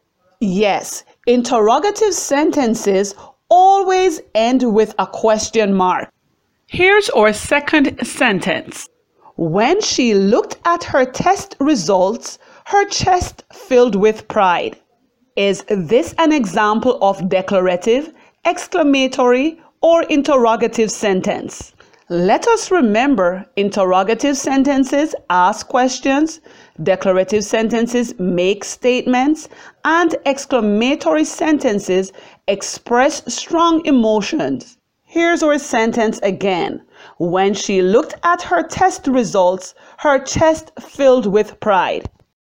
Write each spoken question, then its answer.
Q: Is this an example of declarative, exclamatory, or interrogative sentence?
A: Yes, this is an example of a declarative sentence as a statement is being made.